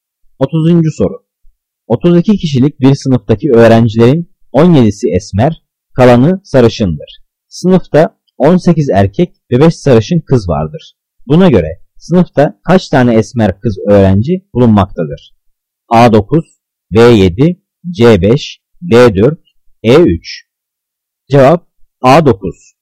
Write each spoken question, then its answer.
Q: Buna göre sınıfta kaç tane esmer kız öğrenci bulunmaktadır?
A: Cevap A9.